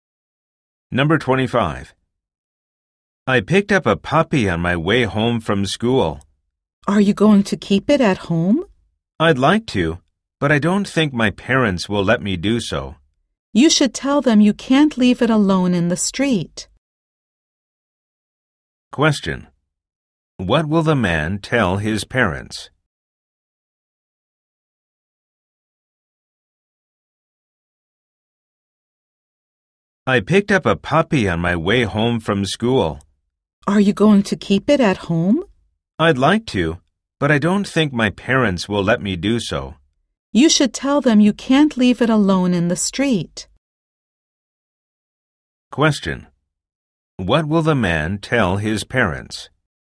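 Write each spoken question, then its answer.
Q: What will the man tell his parents?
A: That he can't leave the puppy alone in the street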